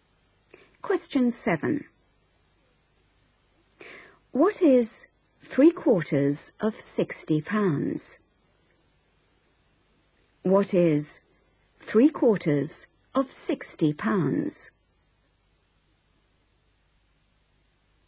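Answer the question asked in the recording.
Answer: £45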